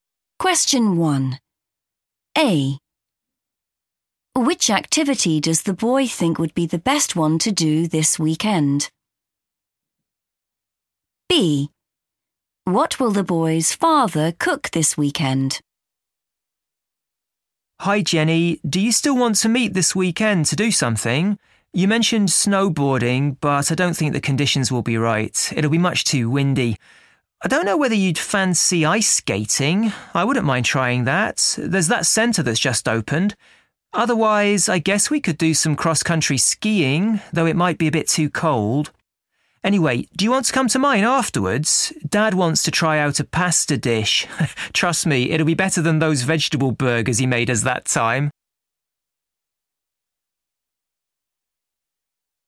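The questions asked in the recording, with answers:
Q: Which activity does the boy think would be the best one to do this weekend?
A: ice skating

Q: What will the boy's father cook this weekend?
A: a pasta dish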